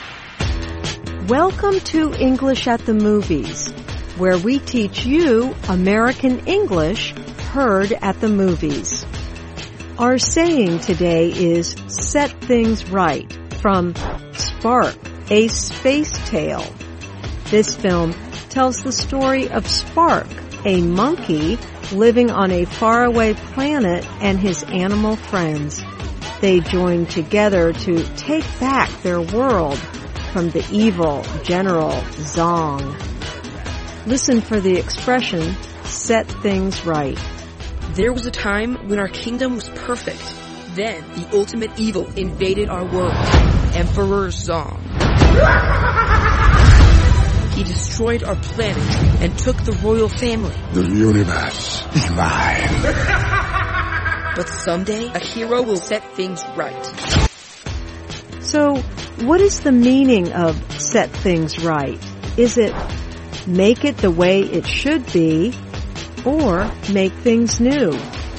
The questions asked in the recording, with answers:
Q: So, what is the meaning of set things right?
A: Set things right means to make things the way they should be.